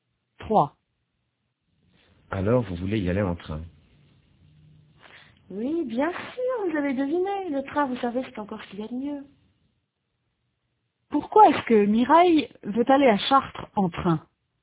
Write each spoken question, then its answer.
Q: Pourquoi est-ce que Mireille veut aller à Chartres en train?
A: Parce que c'est ce qu'il y a de mieux.